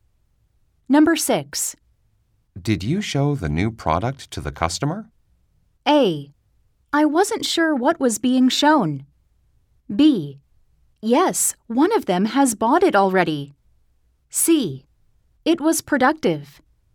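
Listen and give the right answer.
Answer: B: Yes, one of them has bought it already.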